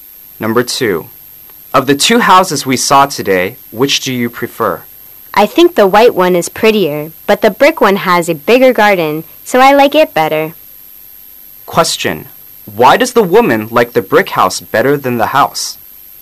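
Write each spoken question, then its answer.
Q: why does the woman like the brick house better than the house?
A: It has a bigger garden

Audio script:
[解析] M: Of the two houses we saw today, which do you prefer? W: I think the white one is prettier, but the brick one has a bigger garden. So I like it better. Q: Why does the woman like the brick house better than the white house?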